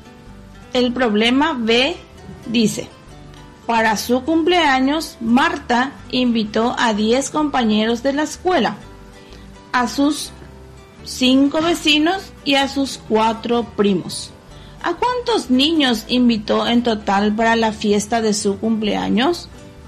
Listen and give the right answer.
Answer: Sería, invitó en total a la fiesta de su cumpleaños 19 niños.